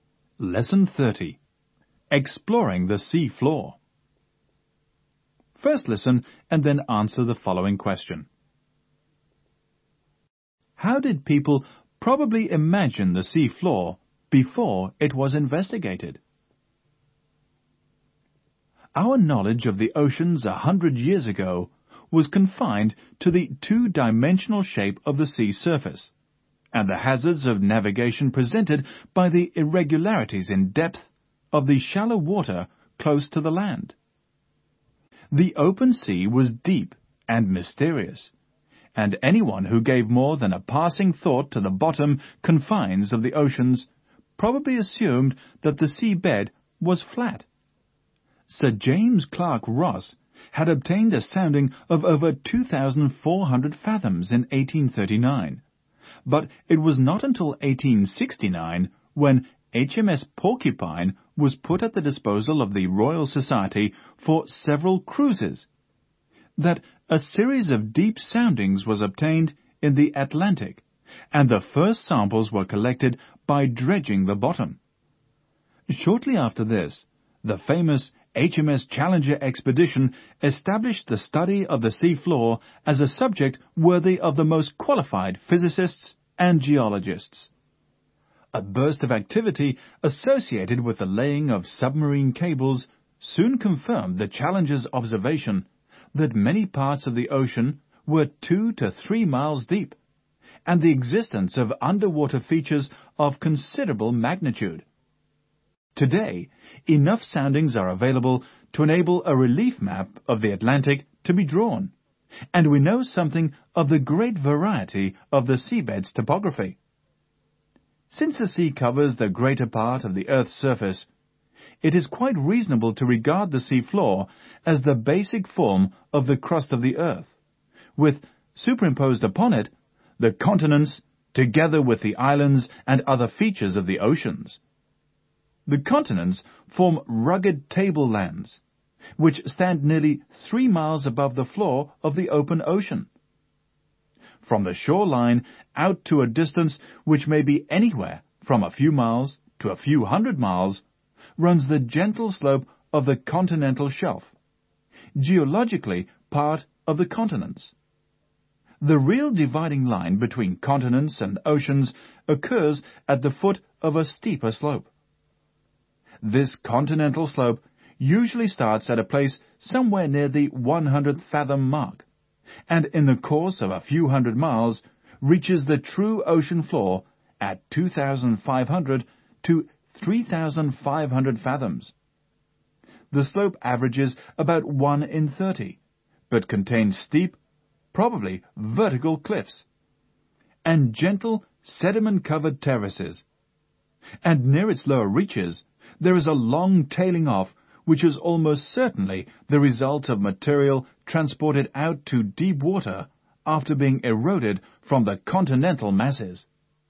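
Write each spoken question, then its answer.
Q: How did people probably imagine the sea floor before it was investigated?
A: As flat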